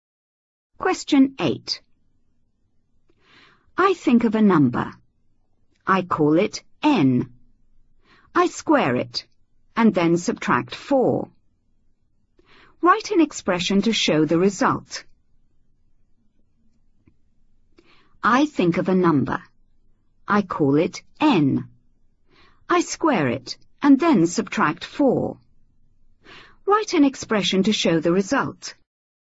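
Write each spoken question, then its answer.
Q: Write an expression to show the result.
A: N2 − 4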